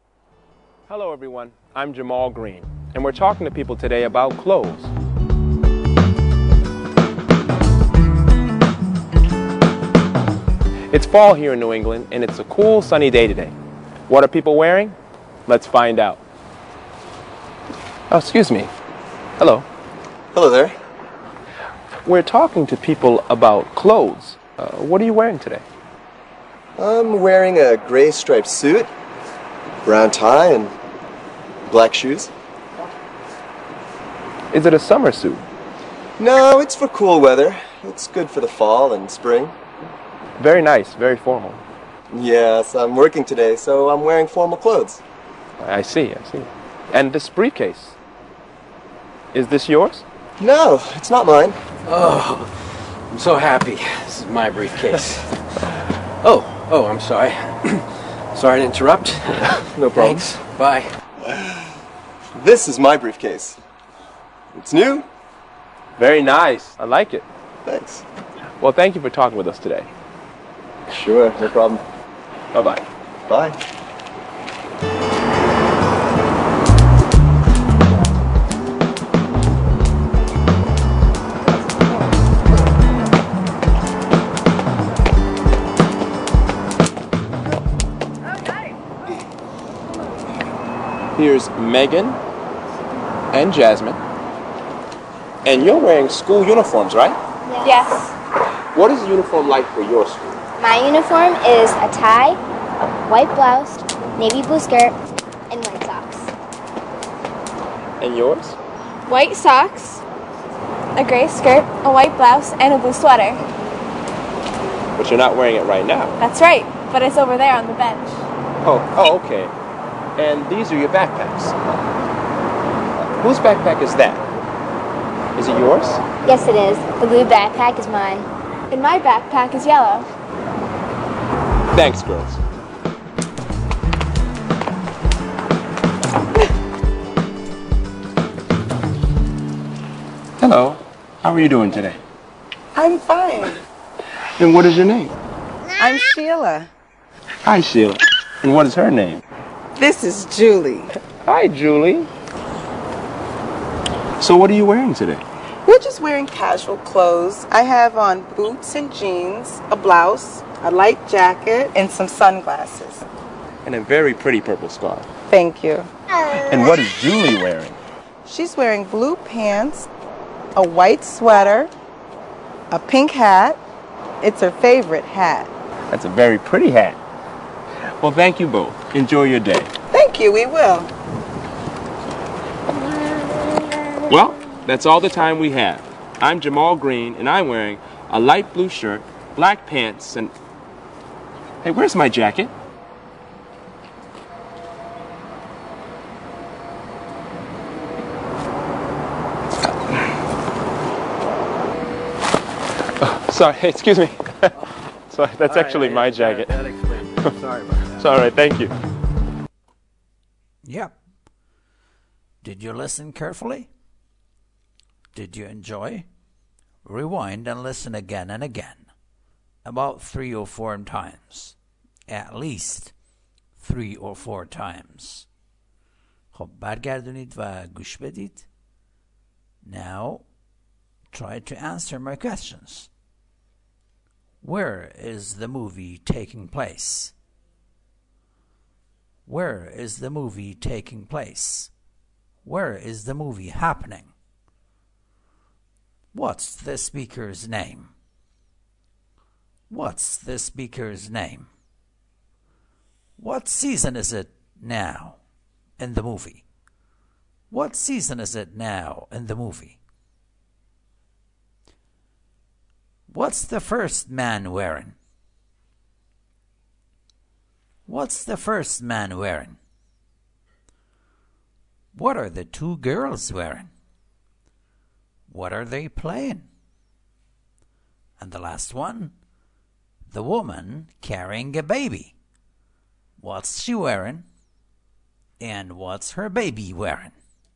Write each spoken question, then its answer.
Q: Where is the movie taking place?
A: In New England. That New England, America.

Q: What season is it now in the movie?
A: It's fall. It's a cool and sunny day.

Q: What's the first man wearing?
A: A gray striped suit, brown tie, and black shoes.